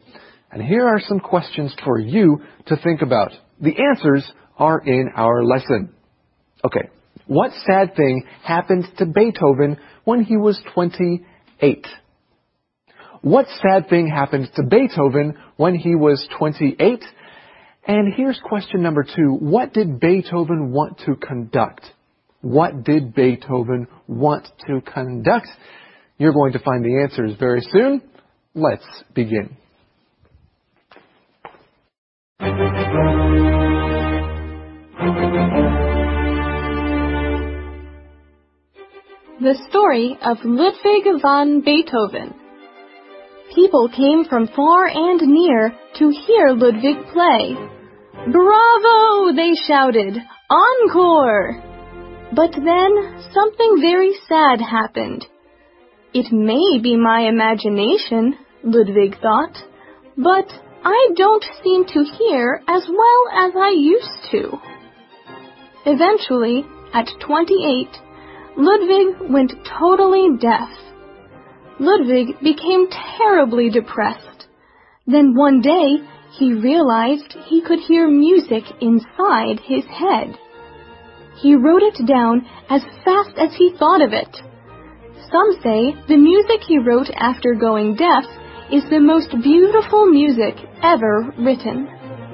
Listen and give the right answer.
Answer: By the time he was only 28 years old, he was completely deaf.